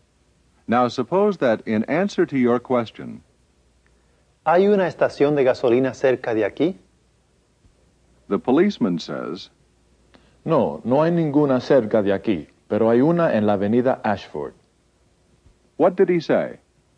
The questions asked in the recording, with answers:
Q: What did he say?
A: He said, No, there isn't any near here, but there is one on Ashford Avenue.